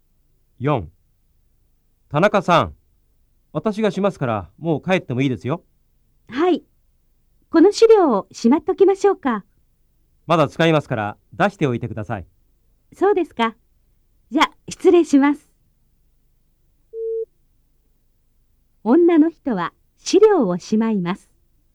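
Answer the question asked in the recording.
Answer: いいえ(正しくない)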